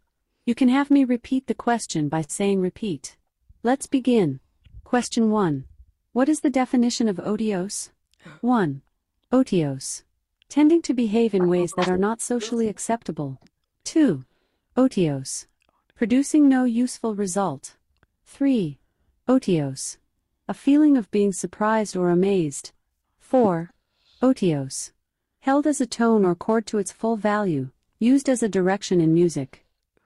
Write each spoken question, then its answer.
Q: What is the definition of otios?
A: The correct answer is 2. Otios.